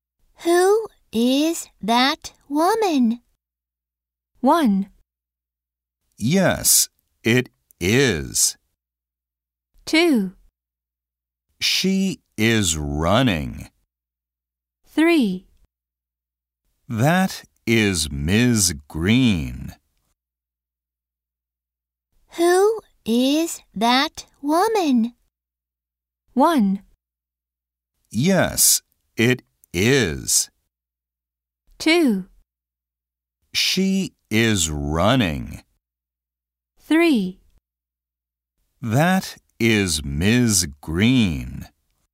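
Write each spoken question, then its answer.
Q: Who is that woman?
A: 3: That is Ms. Green.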